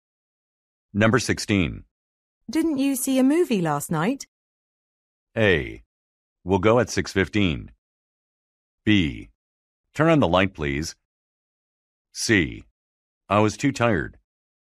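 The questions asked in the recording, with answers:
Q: Didn't you see a movie last night?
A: C: I was too tired.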